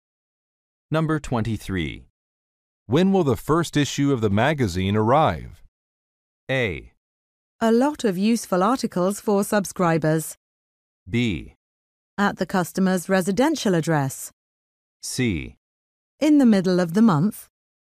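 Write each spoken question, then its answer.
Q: When will the first issue of the magazine arrive?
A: C: In the middle of the month.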